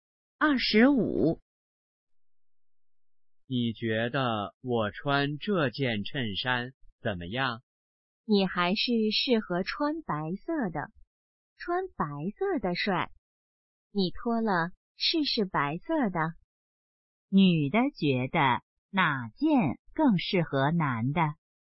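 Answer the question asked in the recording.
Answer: 白色的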